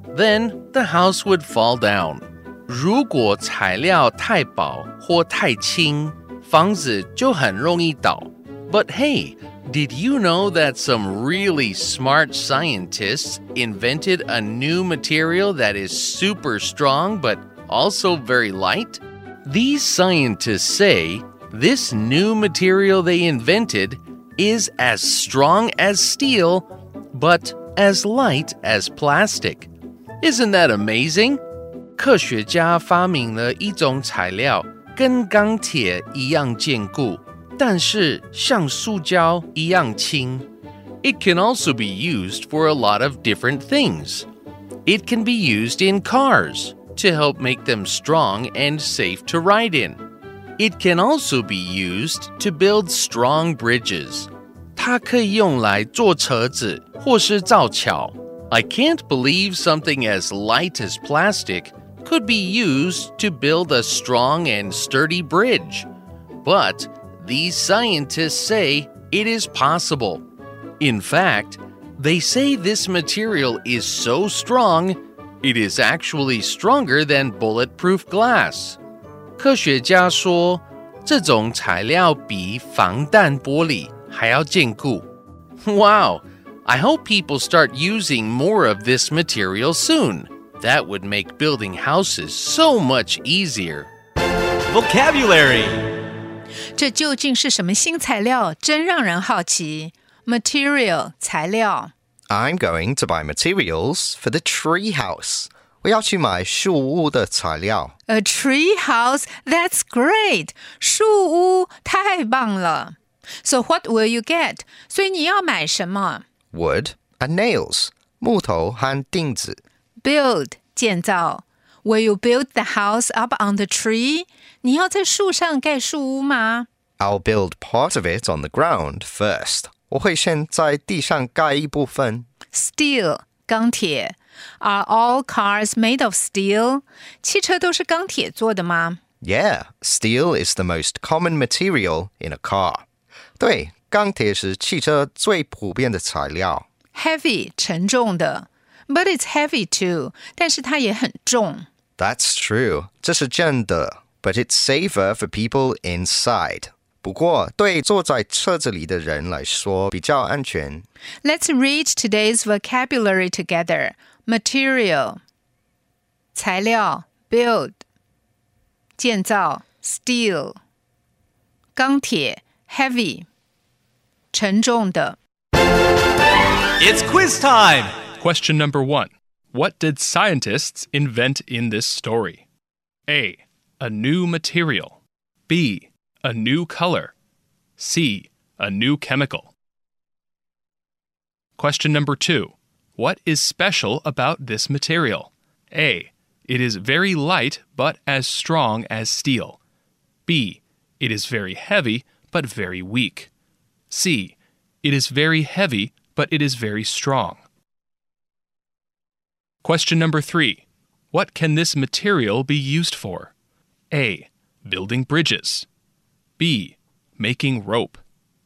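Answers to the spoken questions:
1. A: A new material.
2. A: It is very light but as strong as steel.
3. A: Building bridges.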